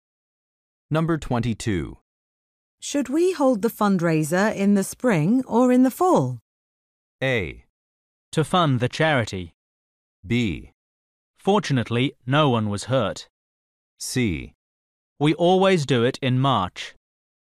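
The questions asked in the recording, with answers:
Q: Should we hold the fundraiser in the spring or in the fall?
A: C: We always do it in March.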